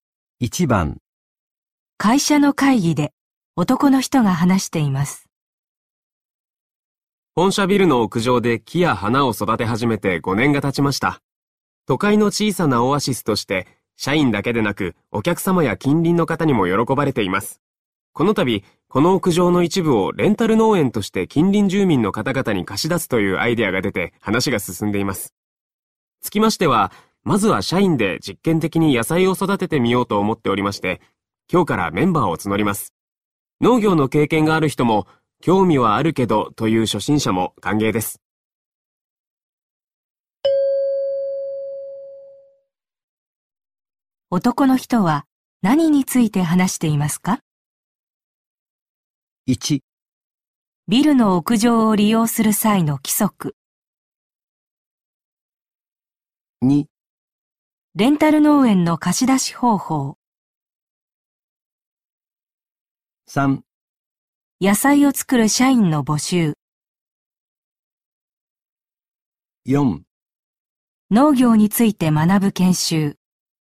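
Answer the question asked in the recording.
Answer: 3: 野菜を作る社員の募集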